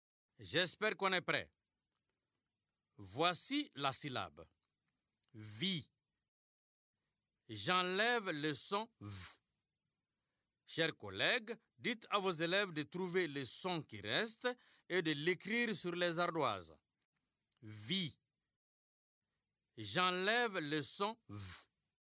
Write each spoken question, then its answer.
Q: Vie. J'enlève le son V.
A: C'est le son I.